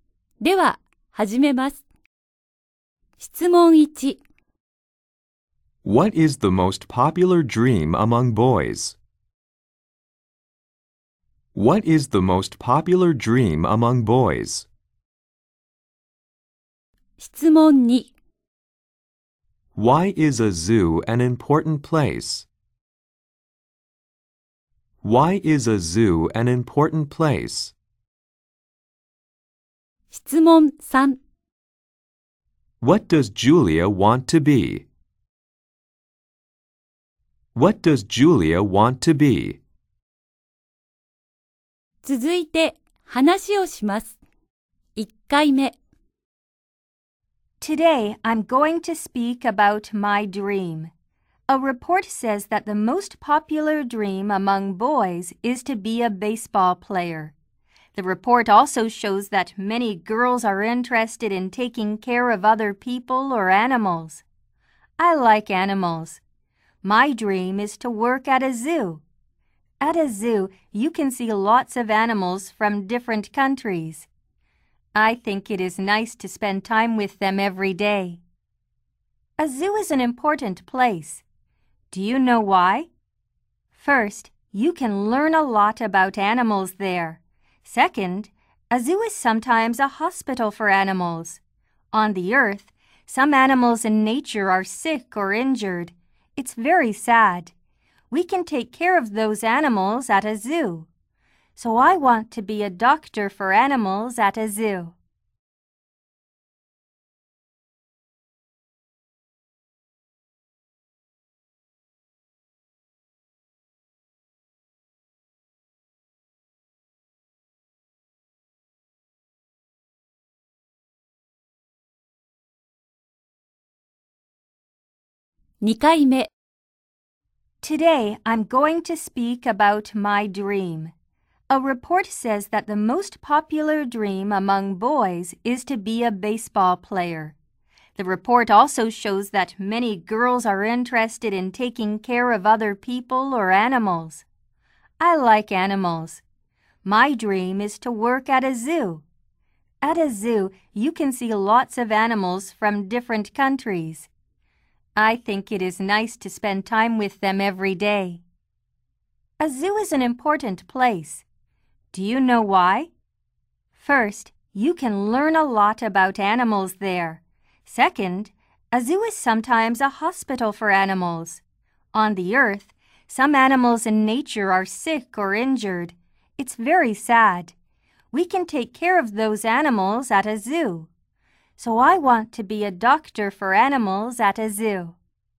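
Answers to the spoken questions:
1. To be a baseball player.
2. You can learn a lot about animals there, and it is sometimes a hospital for animals.
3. A doctor for animals at a zoo.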